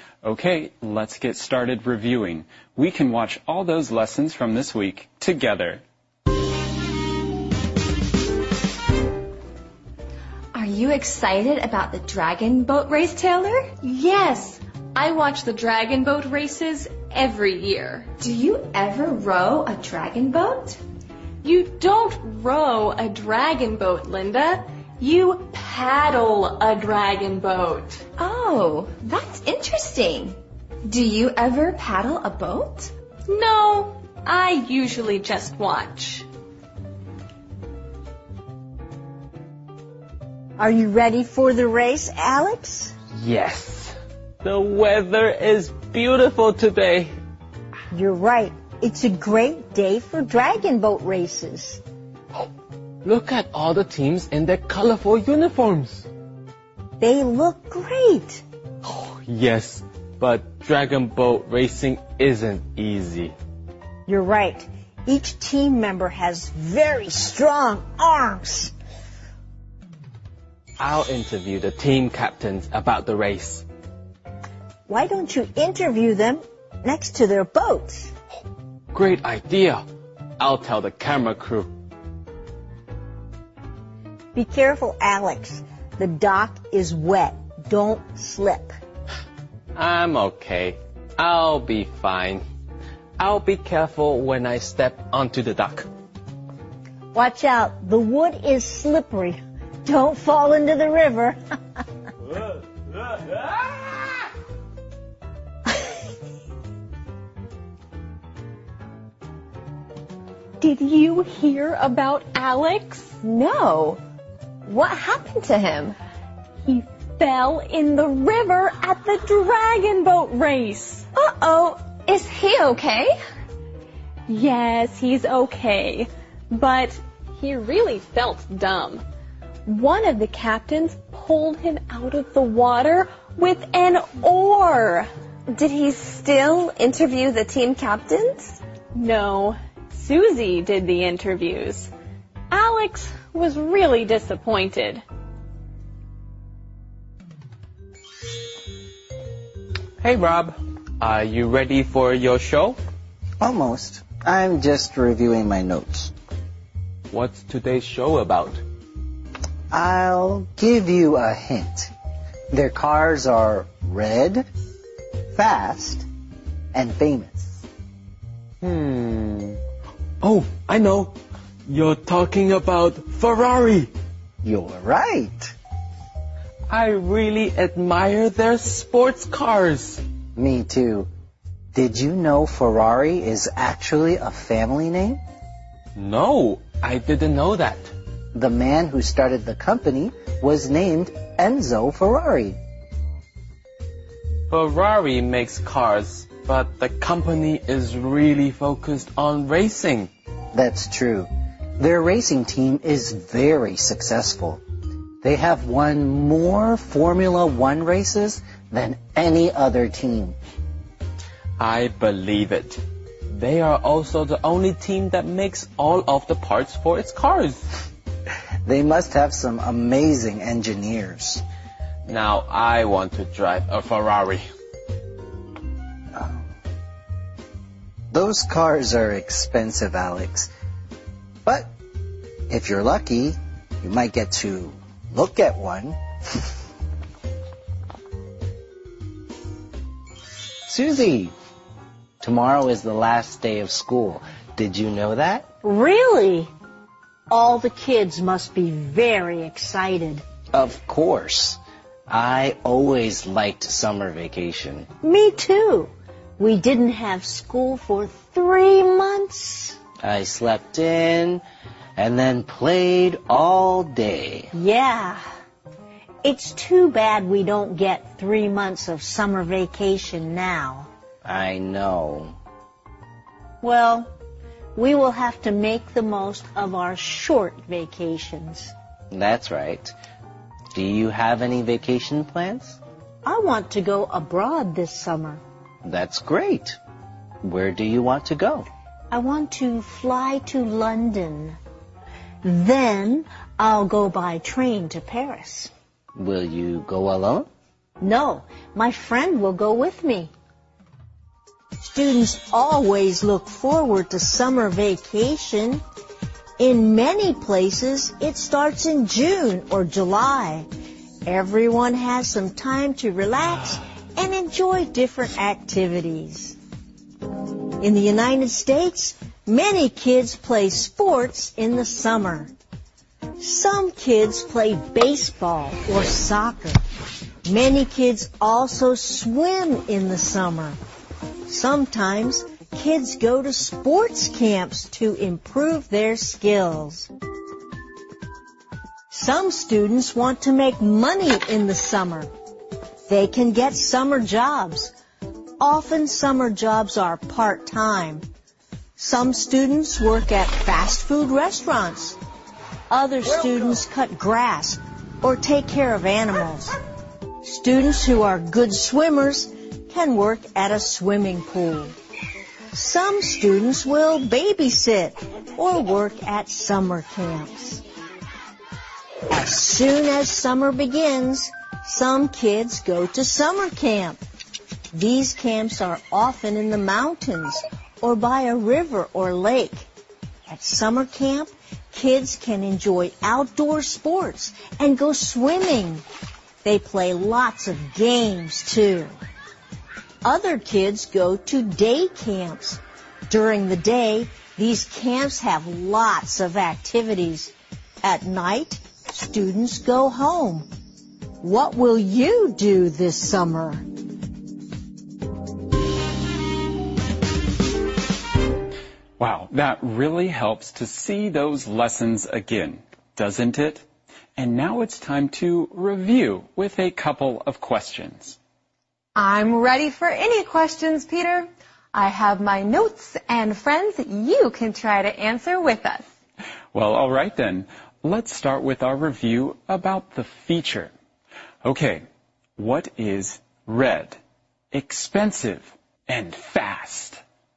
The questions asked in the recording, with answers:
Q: Okay, what is red, expensive, and fast?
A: Oh, I know. A Ferrari sports car.